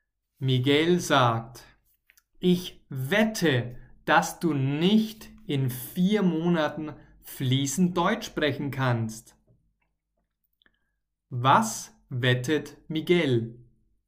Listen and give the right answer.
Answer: Er wettet, dass Pablo nicht in 4 Monaten fließend Deutsch sprechen kann.